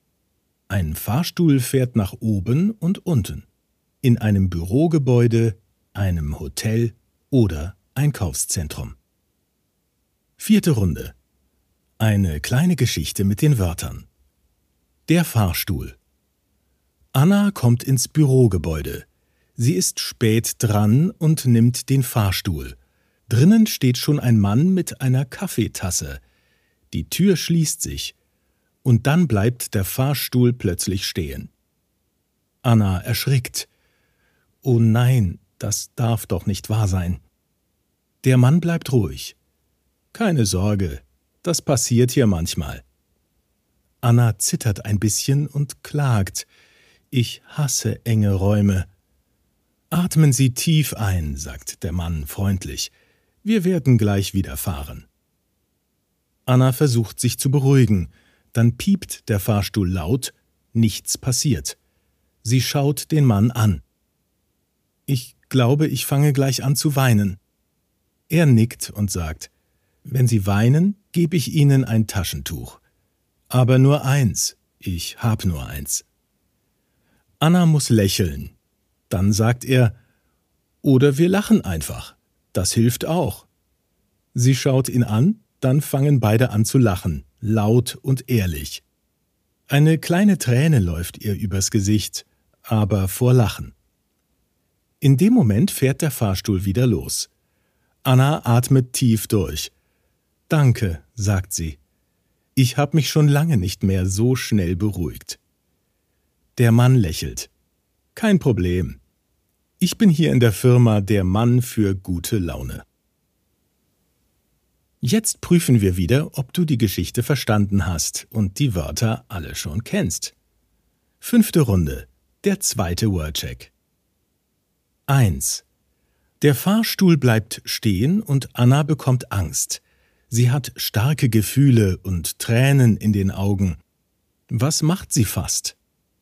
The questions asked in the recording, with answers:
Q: Was macht sie fast?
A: Weinen.